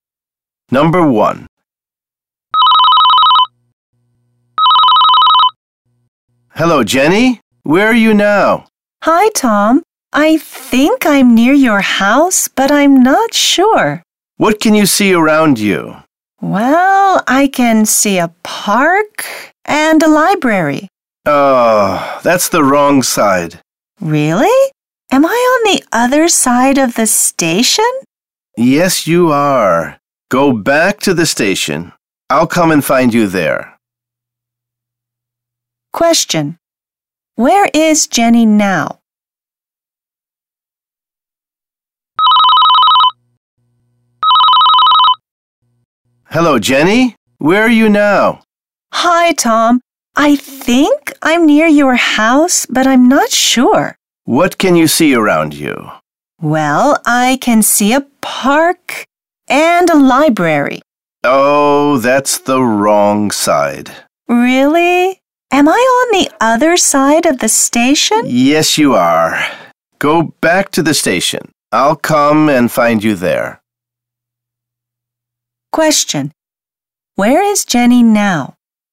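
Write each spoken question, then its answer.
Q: Where is Jenny now?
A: Near a park and a library, on the other side of the station from Tom's house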